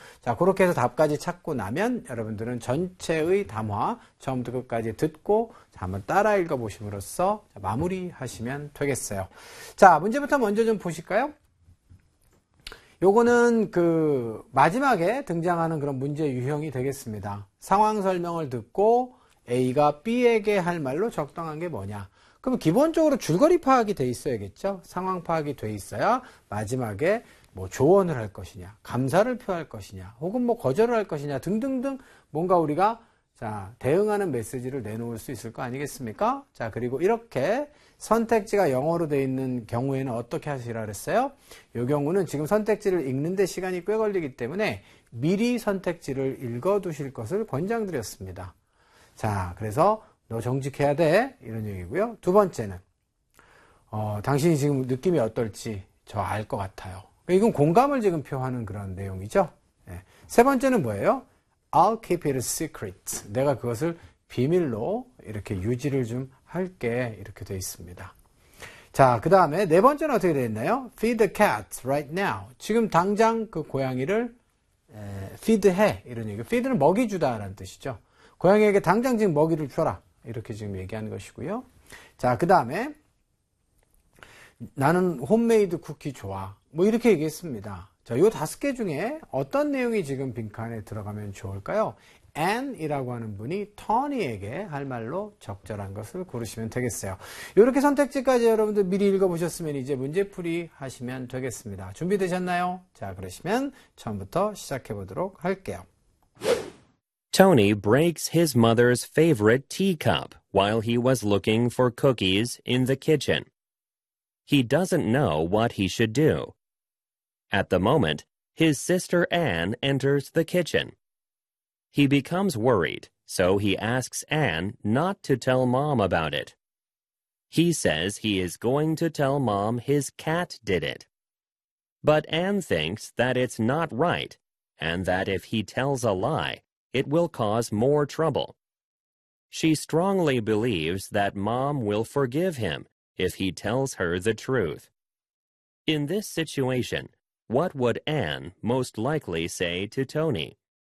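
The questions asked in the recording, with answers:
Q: In this situation, what would Anne most likely say to Tony?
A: 1: You should be honest.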